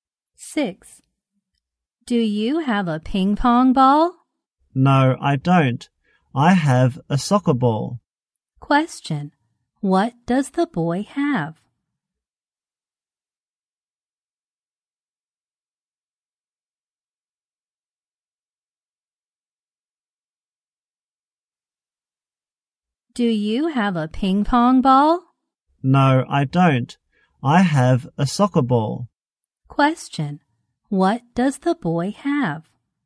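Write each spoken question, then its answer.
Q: What does the boy have?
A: A soccer ball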